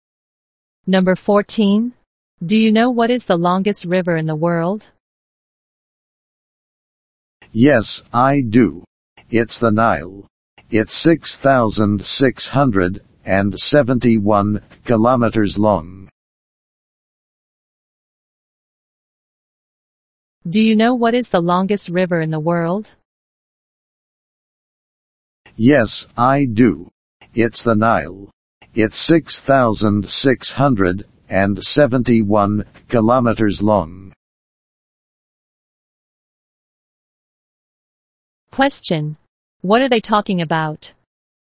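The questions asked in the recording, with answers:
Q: Question. What are they talking about?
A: The longest river in the world (the Nile)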